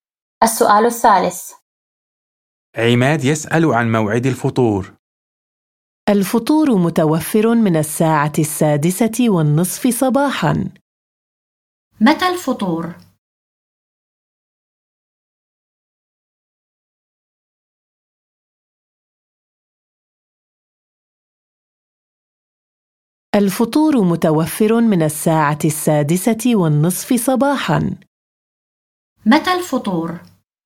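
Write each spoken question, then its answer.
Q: متى الفطور؟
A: من الساعة 6:30 صباحاً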